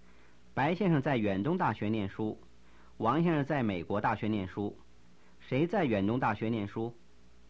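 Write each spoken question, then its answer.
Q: 谁在远东大学念书?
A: 白先生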